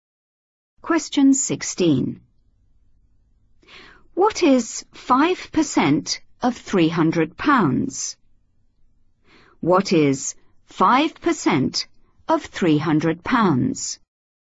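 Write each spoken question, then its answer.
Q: What is 5% of £300?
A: £15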